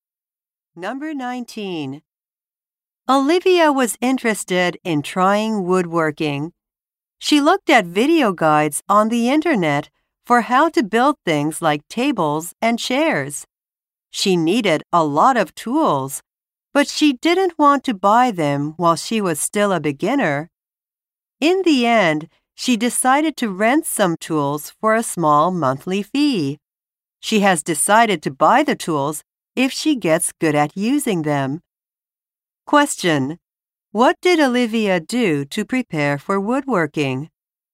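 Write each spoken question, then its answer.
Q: What did Olivia do to prepare for woodworking?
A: She rented tools for a small monthly fee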